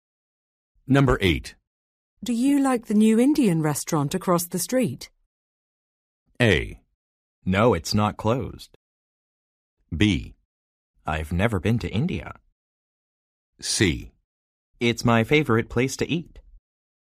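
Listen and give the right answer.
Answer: C: It's my favorite place to eat.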